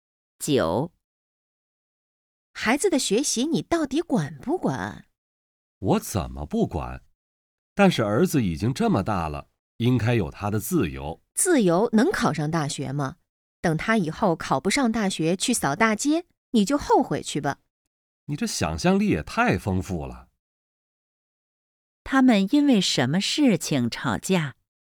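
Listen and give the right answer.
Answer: 孩子(儿子)的学习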